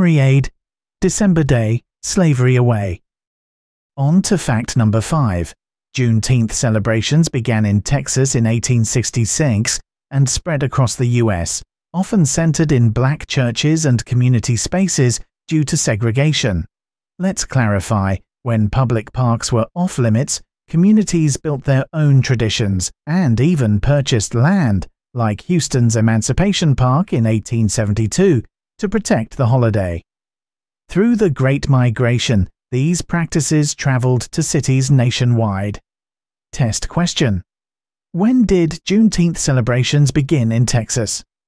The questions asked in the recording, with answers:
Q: When did Juneteenth celebrations begin in Texas?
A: 1866.